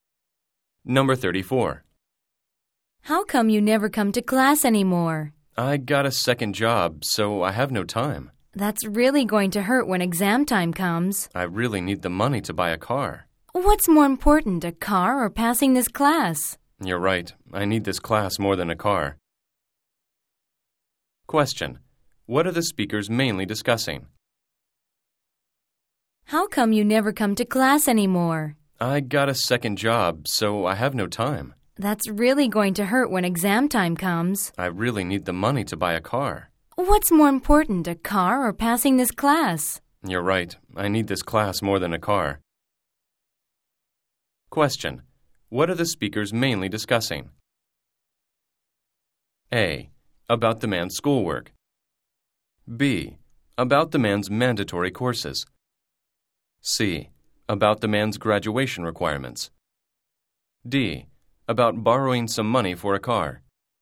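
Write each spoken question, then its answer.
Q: What are the speakers mainly discussing?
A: A: About the man's schoolwork.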